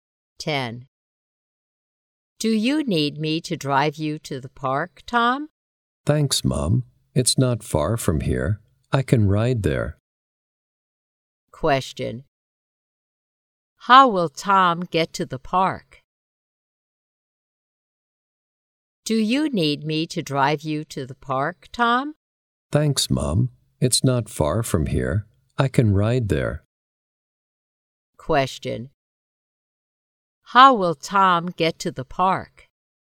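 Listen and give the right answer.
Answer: By bike (he'll ride there)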